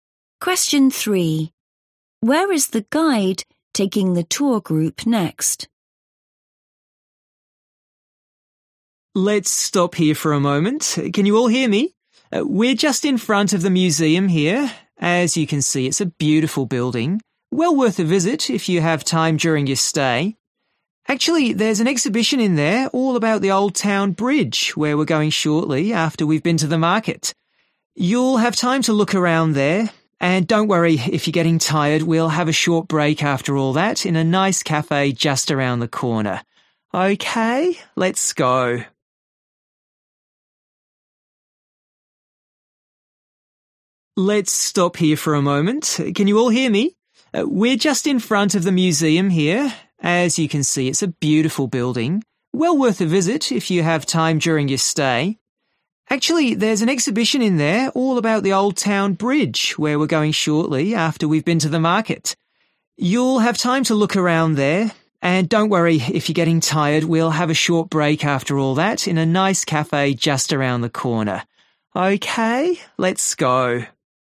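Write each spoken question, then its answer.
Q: Where is the guide taking the tour group next?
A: To the market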